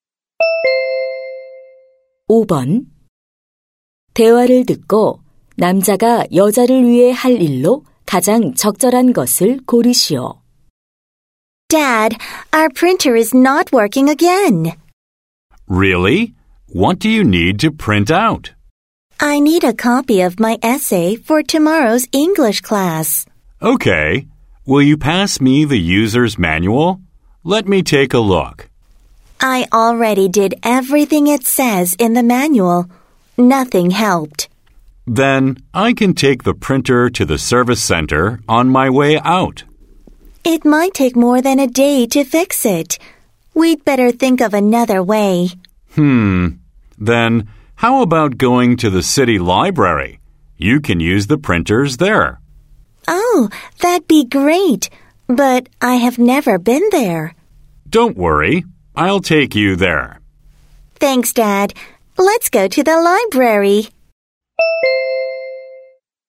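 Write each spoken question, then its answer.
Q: 대화를 듣고 남자가 여자를 위해 할 일로 가장 적절한 것을 고르시오.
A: 시립 도서관에 데려다주기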